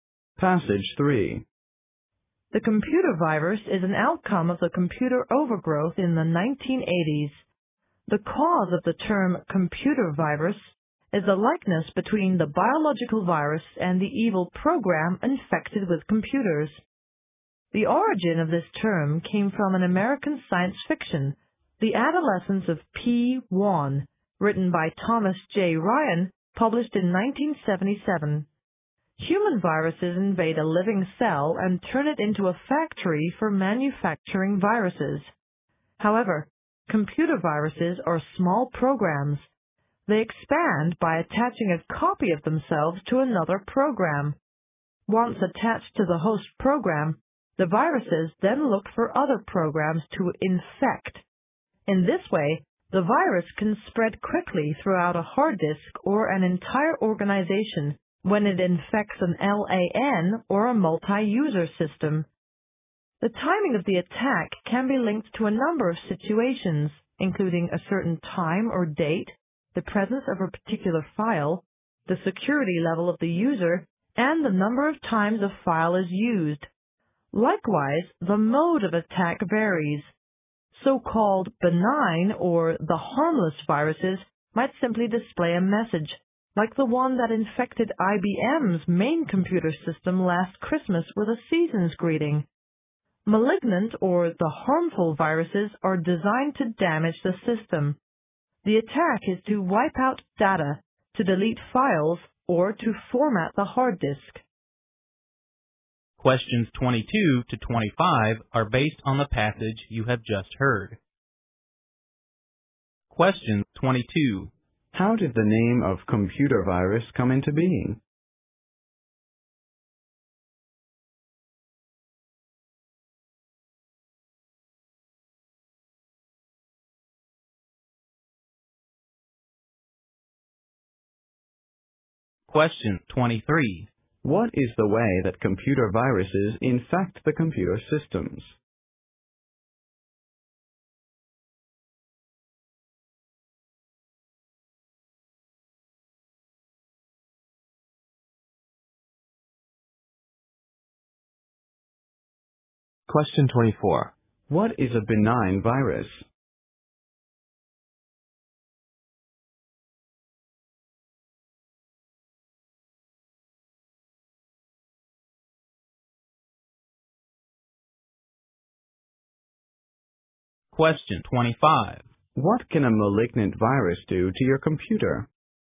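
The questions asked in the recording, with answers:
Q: How did the name of computer virus come into being?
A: From its likeness to biological viruses

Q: What is the way that computer viruses infect the computer systems?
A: By attaching a copy of themselves to other programs

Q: What is a benign virus?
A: A harmless virus that might simply display a message

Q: What can a malignant virus do to your computer?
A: Wipe out data, delete files or format the hard disk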